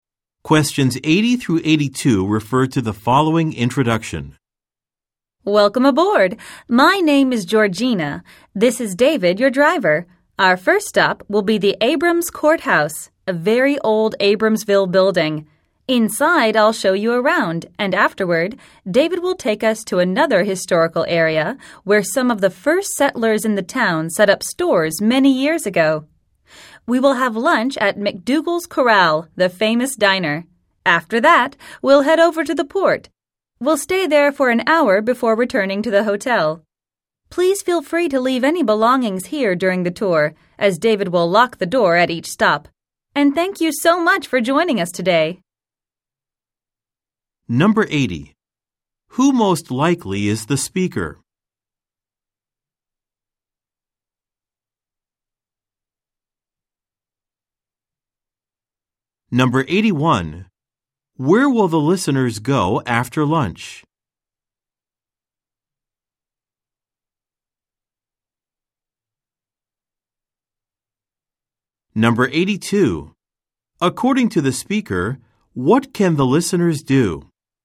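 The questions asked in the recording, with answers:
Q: Who most likely is the speaker?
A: A tour guide

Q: Where will the listeners go after lunch?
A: To the port

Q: According to the speaker, what can the listeners do?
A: Leave their belongings on the bus during the tour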